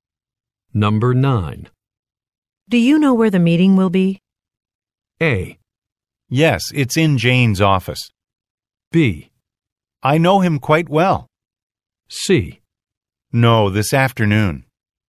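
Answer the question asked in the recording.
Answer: A: Yes, it's in Jane's office.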